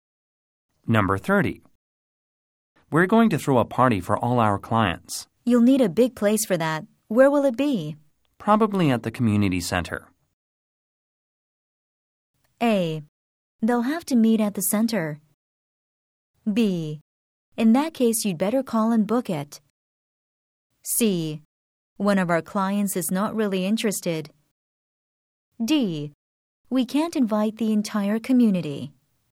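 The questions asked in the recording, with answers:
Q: Probably at the community center.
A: B: In that case, you'd better call and book it.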